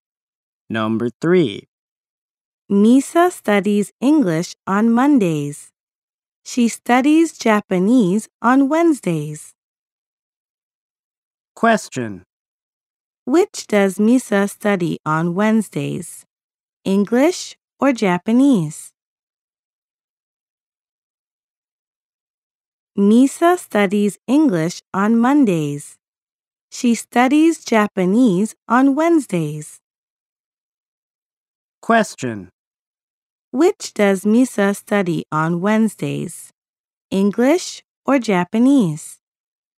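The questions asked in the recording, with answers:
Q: Which does Misa study on Wednesdays?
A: Japanese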